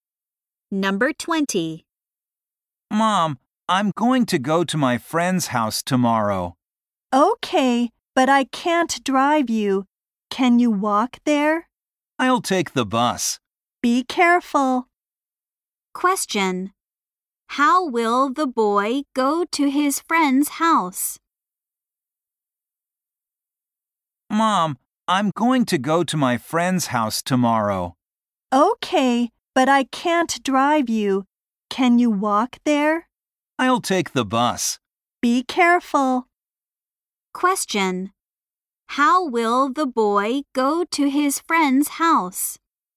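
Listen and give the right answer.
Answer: By bus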